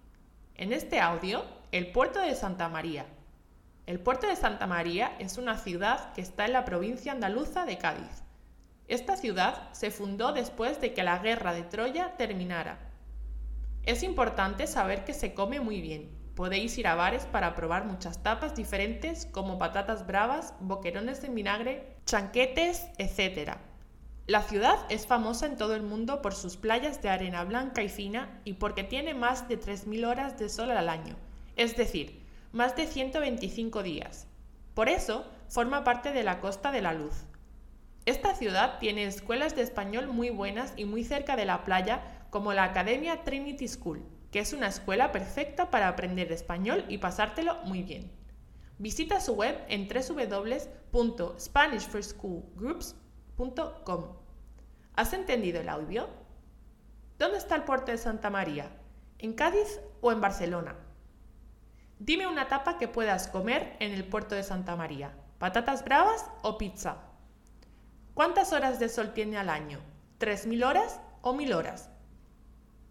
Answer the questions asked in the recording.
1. Cádiz
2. patatas bravas
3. 3.000 horas